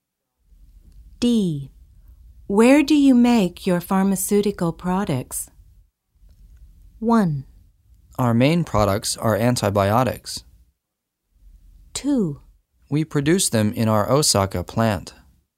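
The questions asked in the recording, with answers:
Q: Where do you make your pharmaceutical products?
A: 2: We produce them in our Osaka plant.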